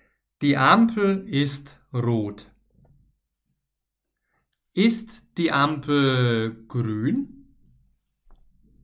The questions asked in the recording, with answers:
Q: Ist die Ampel grün?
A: Nein, nein, die Ampel ist nicht grün.